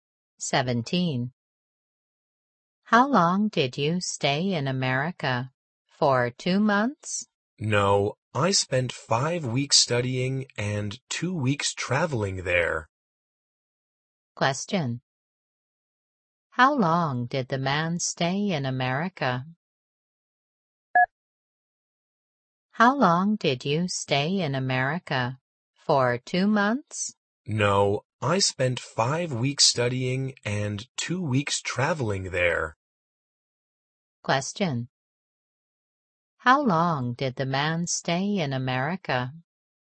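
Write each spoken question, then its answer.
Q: How long did the man stay in America?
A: 7 weeks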